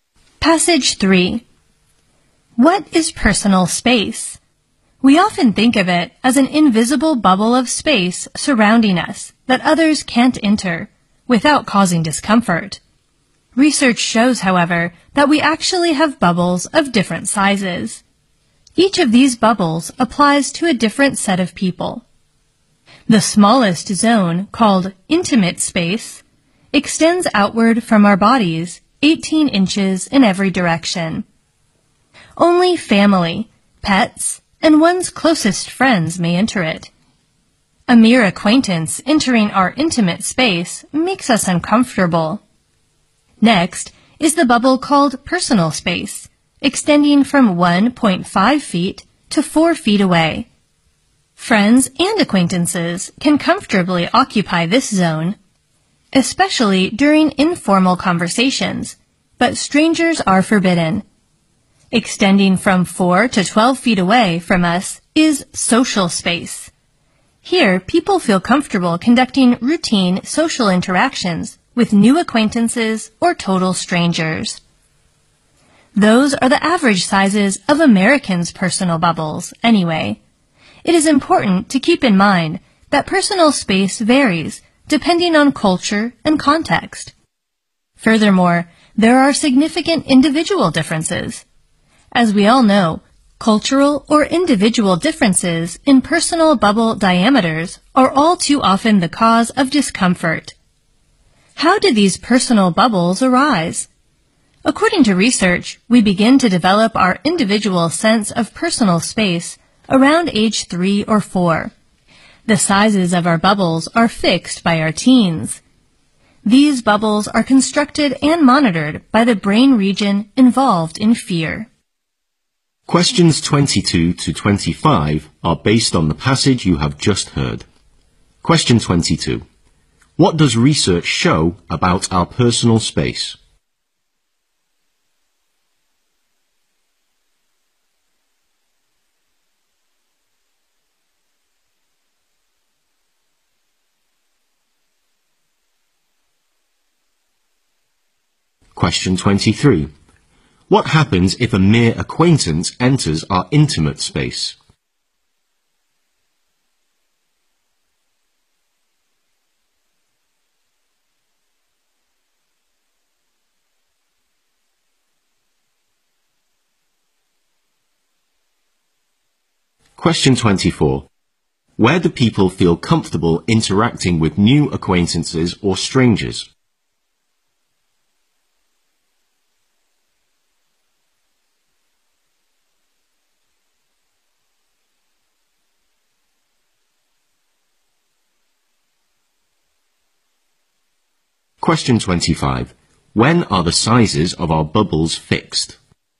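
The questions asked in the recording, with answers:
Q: What does research show about our personal space?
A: We have bubbles of different sizes for different sets of people.

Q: What happens if a mere acquaintance enters our intimate space?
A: We feel uncomfortable.

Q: Where do people feel comfortable interacting with new acquaintances or strangers?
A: In social space, 4 to 12 feet away.

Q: When are the sizes of our bubbles fixed?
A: By our teens.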